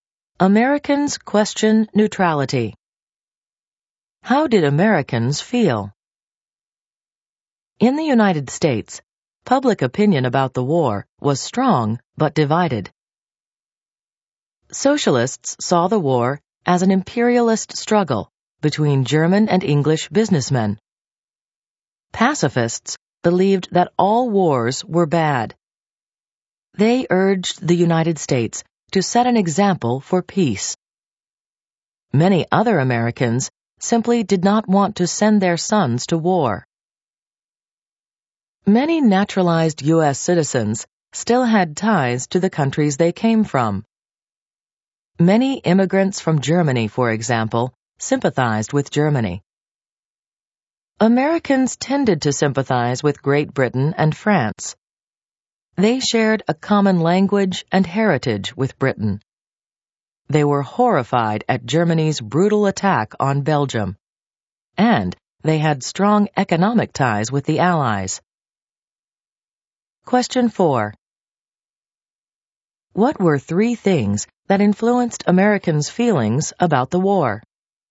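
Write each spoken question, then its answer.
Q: What were three things that influenced Americans' feelings about the war?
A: Ties to their home countries, a shared language and heritage with Britain, horror at Germany's attack on Belgium, and economic ties with the Allies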